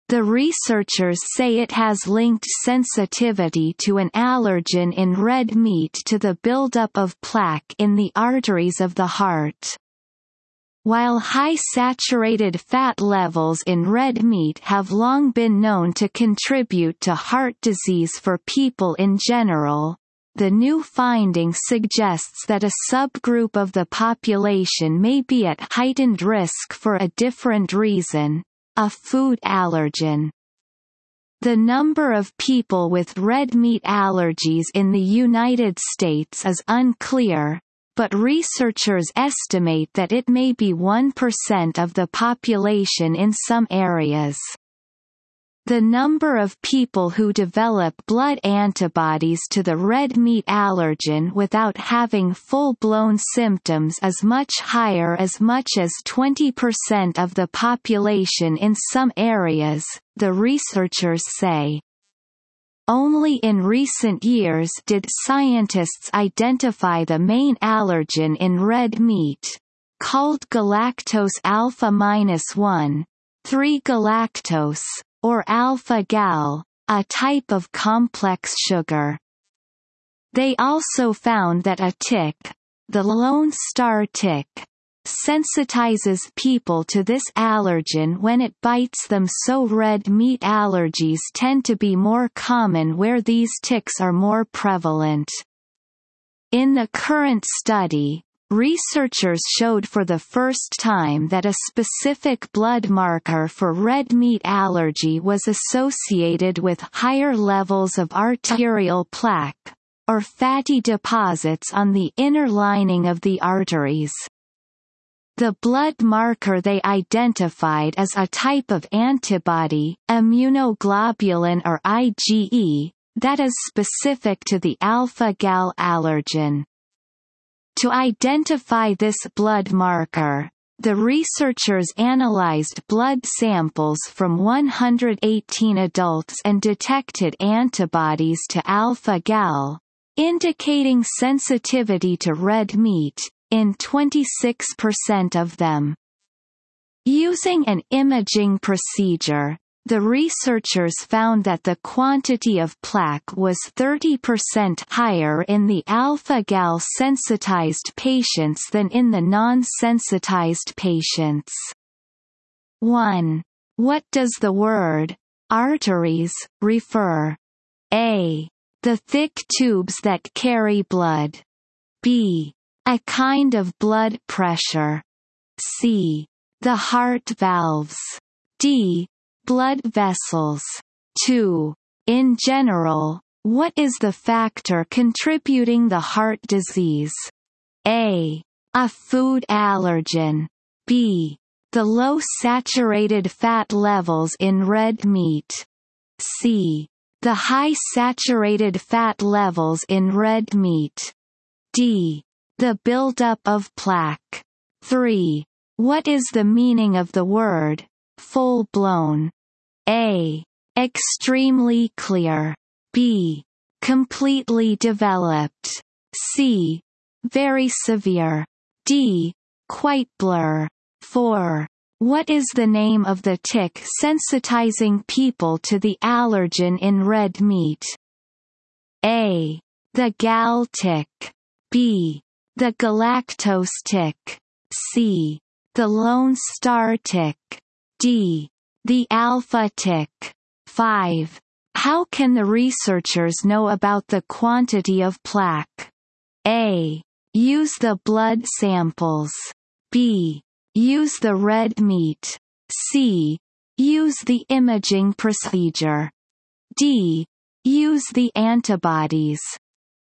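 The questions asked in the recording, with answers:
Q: In general, what is the factor contributing to heart disease?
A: C: The high saturated fat levels in red meat.

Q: What is the name of the tick sensitizing people to the allergen in red meat?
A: C: The lone star tick.

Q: How can the researchers know about the quantity of plaque?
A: C: Use the imaging procedure.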